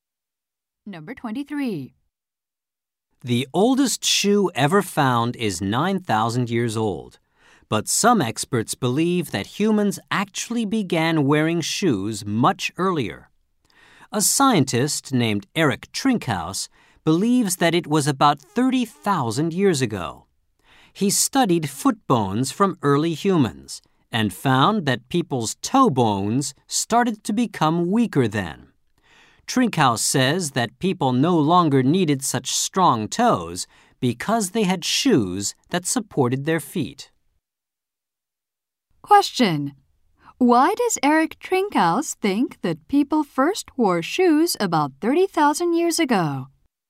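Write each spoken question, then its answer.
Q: Why does Eric Trinkhouse think that people first wore shoes about 30,000 years ago?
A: Toe bones became weaker then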